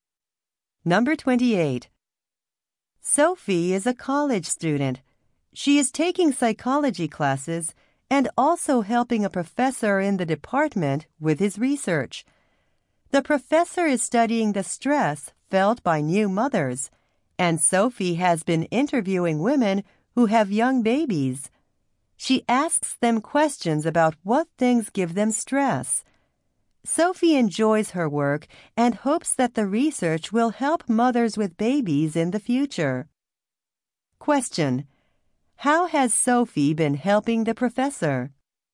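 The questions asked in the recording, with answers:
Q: How has Sophie been helping the professor?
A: By interviewing women with young babies.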